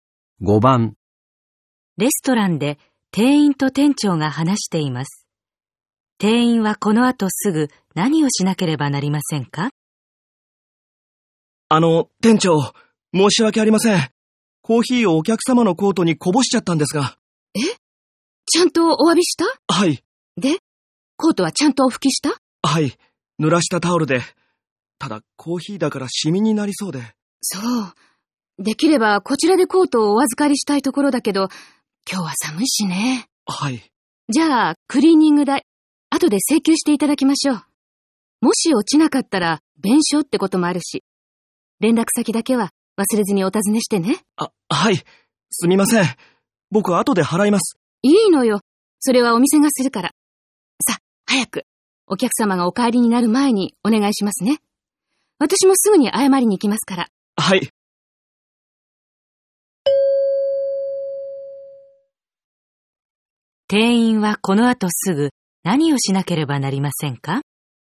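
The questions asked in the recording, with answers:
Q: 店員はこの後すぐ何をしなければなりませんか?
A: お客様の連絡先を尋ねる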